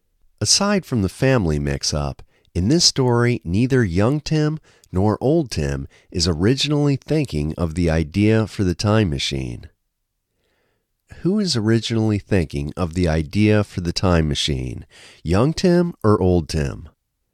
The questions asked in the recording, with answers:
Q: Who is originally thinking of the idea for the time machine, young Tim or old Tim?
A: Neither young Tim nor old Tim are originally thinking of the idea for the time machine.